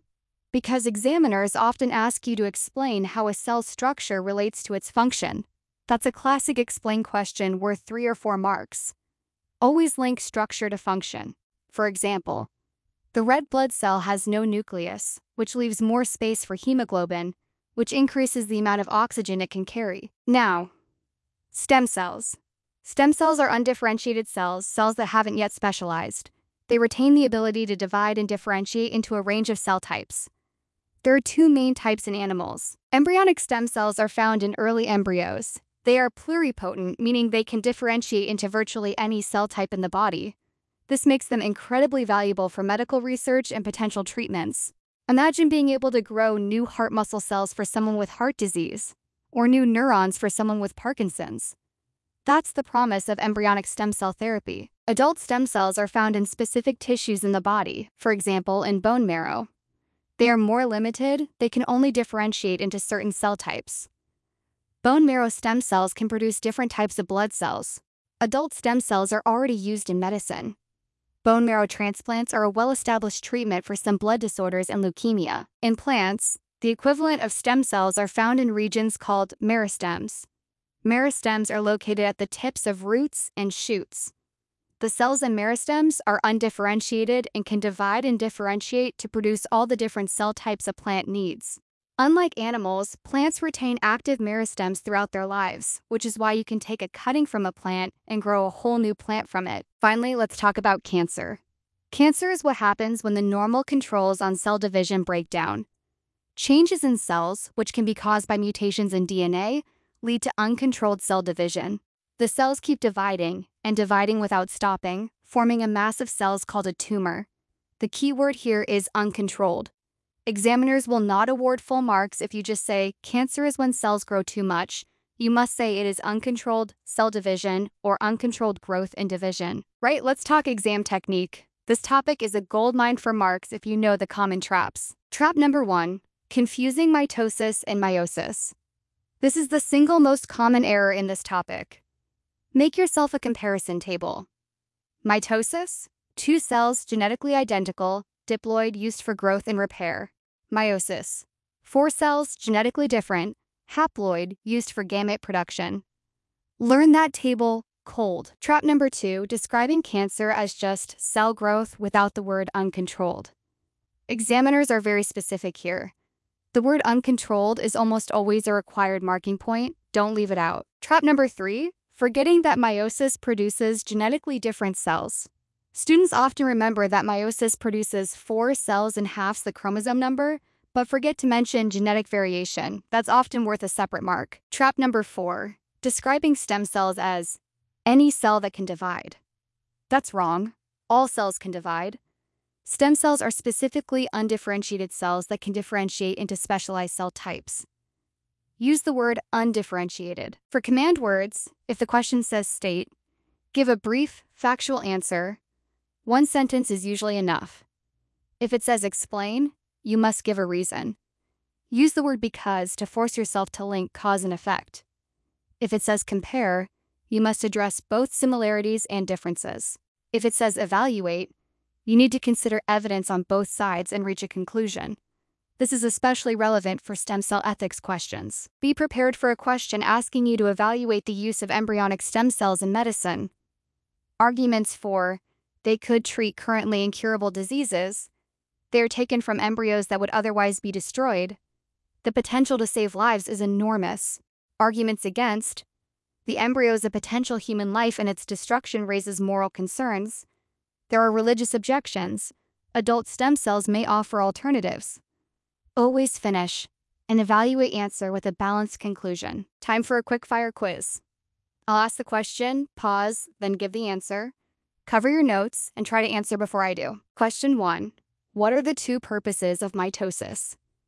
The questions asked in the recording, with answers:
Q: what are the two purposes of mitosis?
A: Growth and repair or replacement of worn out cells?